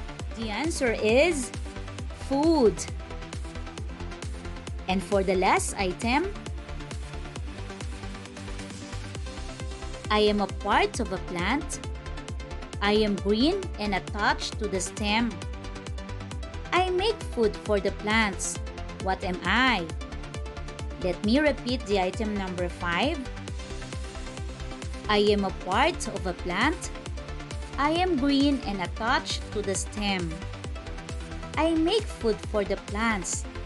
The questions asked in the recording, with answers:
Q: What am I?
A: Well, the answer is leaf or leaves.